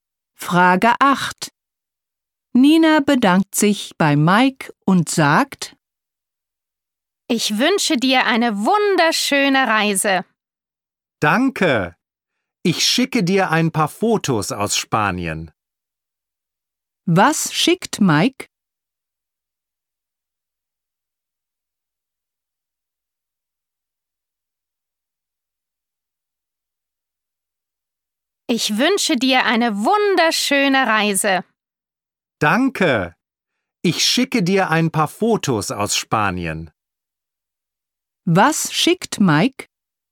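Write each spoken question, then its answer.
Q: Was schickt Mike?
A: Ein paar Fotos aus Spanien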